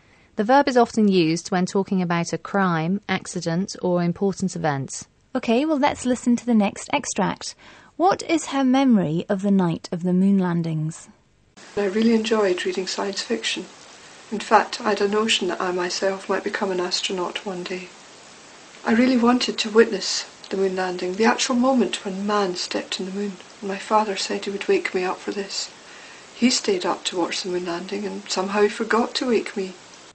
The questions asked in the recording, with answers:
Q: What is her memory of the night of the moon landings?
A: but unfortunately her father forgot to wake her up, so she missed the whole thing, poor girl.